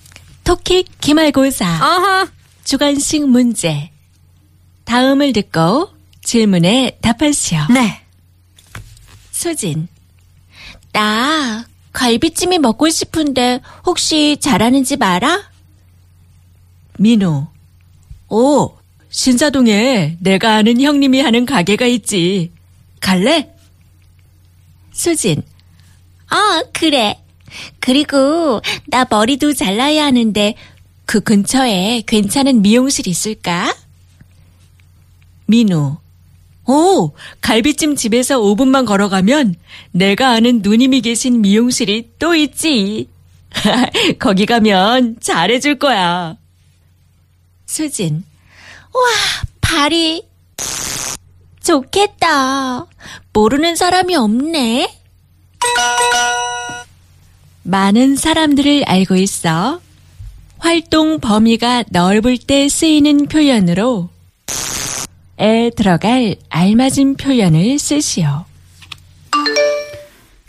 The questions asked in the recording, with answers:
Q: 많은 사람들을 알고 있어. 활동 범위가 넓을 때 쓰이는 표현으로 에 들어갈 알맞은 표현을 쓰시오.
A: So that's the expression, 발이 넓다.